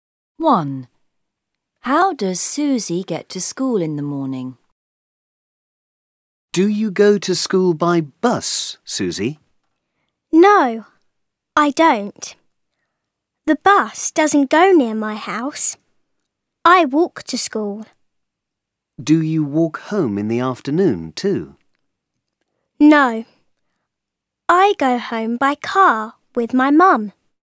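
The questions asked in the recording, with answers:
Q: How does Susie get to school in the morning?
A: She walks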